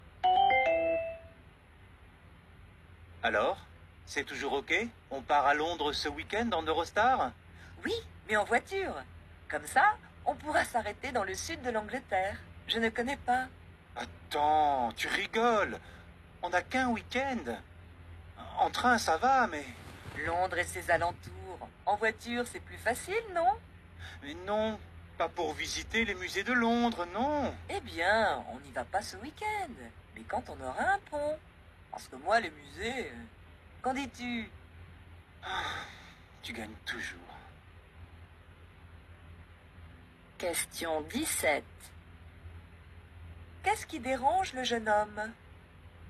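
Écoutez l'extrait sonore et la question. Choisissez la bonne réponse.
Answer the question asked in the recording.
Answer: Partir en voiture, ce qui empêche de visiter les musées de Londres en un week-end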